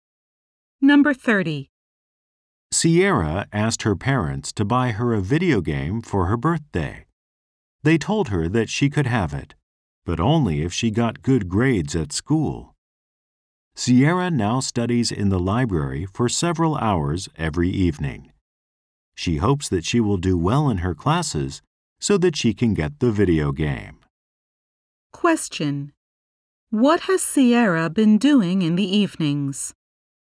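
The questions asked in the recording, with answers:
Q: What has Sierra been doing in the evenings?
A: Studying in the library for several hours.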